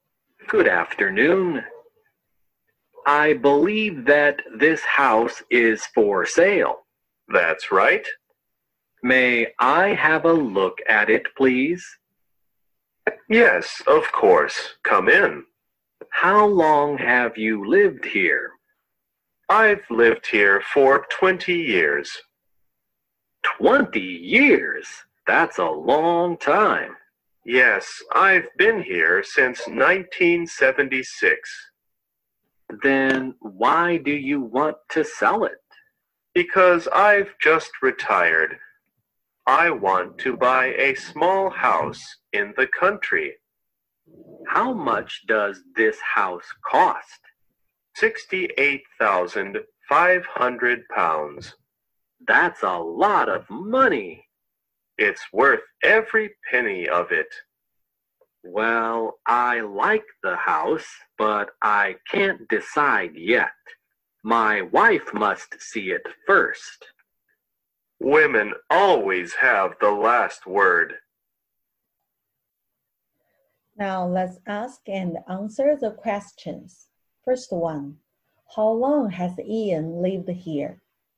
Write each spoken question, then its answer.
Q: how long has Ian lived here?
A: He has lived here for 20 years, or we can say he has been here since 1976.